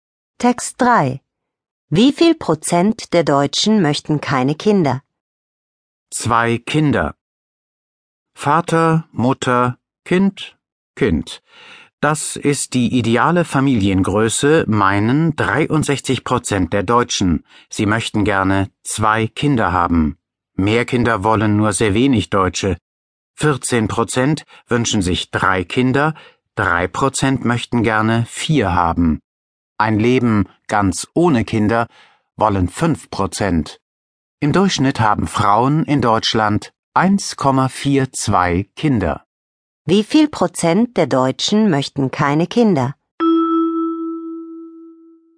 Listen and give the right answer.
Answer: Fünf Prozent der Deutschen möchten keine Kinder.